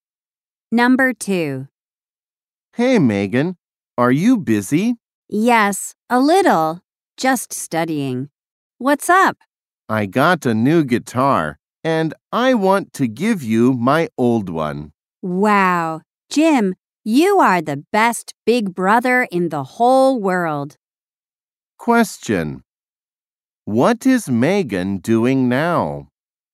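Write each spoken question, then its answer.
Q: What is Megan doing now?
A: Studying.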